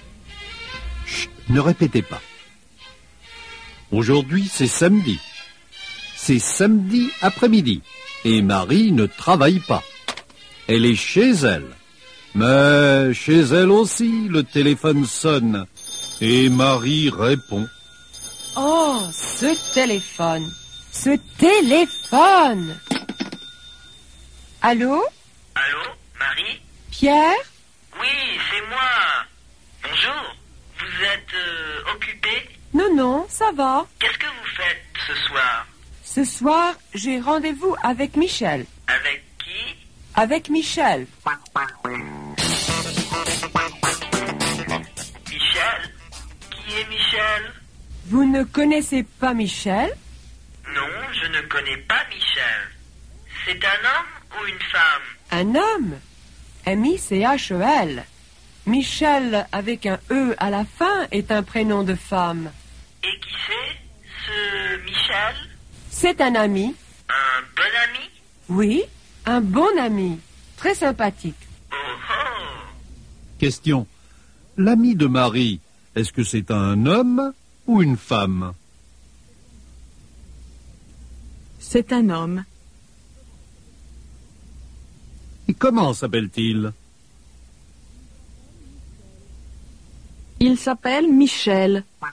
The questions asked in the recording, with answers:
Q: L'ami de Marie, est-ce que c'est un homme ou une femme?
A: C'est un homme.